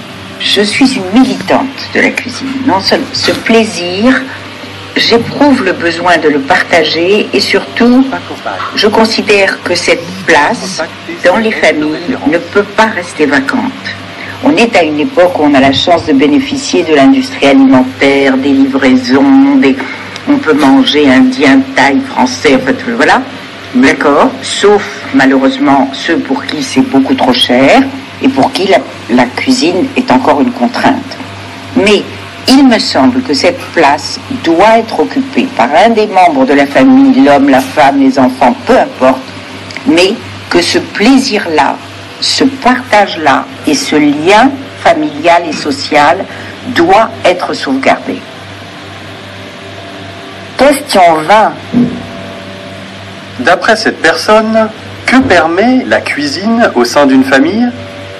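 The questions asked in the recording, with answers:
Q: D'après cette personne, que permet la cuisine au sein d'une famille ?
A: Partager un plaisir et sauvegarder le lien familial et social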